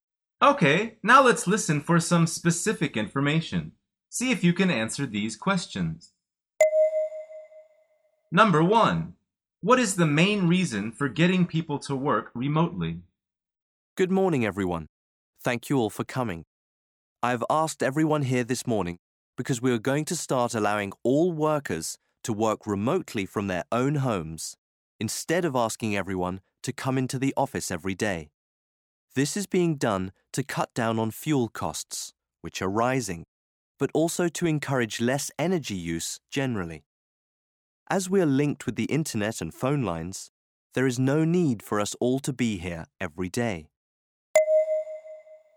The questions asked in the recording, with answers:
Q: what is the main reason for getting people to work remotely?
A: The answer is to save money and energy.